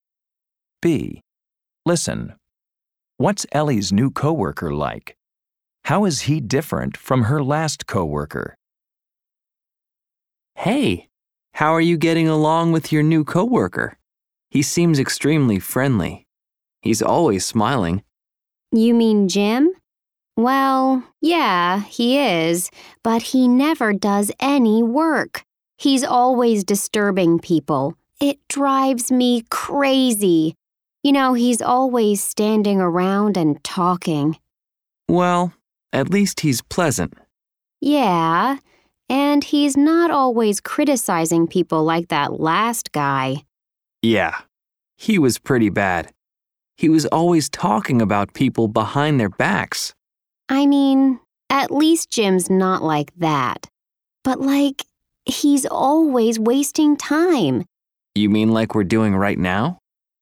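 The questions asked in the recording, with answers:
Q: What's Ellie's new coworker like?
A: Friendly and always smiling, but he never does any work; he's always disturbing people and wasting time

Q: How is he different from her last coworker?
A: He doesn't criticize people or talk about them behind their backs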